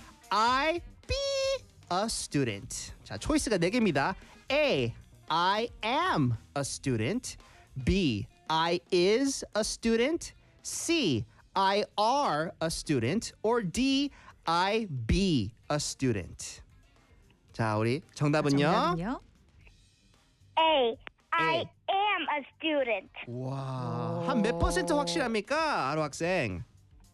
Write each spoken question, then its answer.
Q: I be a student.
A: A. I am a student.